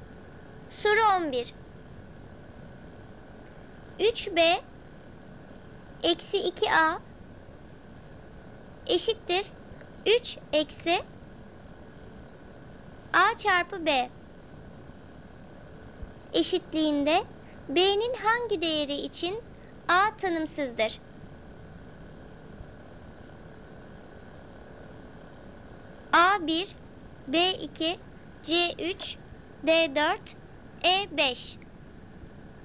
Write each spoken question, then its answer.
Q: eşitliğinde b'nin hangi değeri için a tanımsızdır?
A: Doğru cevap B 2.